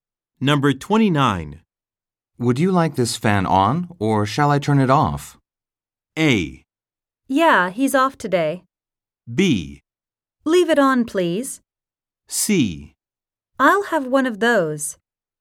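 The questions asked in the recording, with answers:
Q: Would you like this fan on, or shall I turn it off?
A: B: Leave it on, please.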